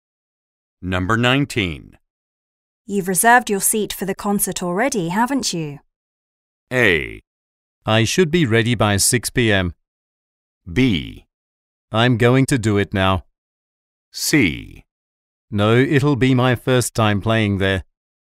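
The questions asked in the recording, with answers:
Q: You've reserved your seat for the concert already, haven't you?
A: B: I'm going to do it now.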